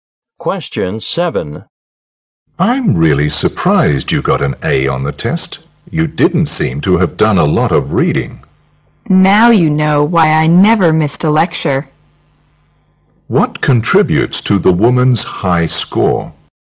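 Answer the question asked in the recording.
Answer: She went to every lecture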